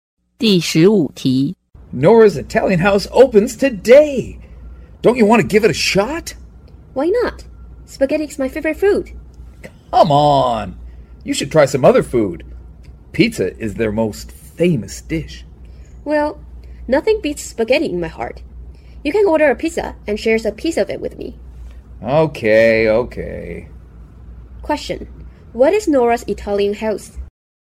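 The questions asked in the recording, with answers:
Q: What is Nora's Italian House?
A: An Italian restaurant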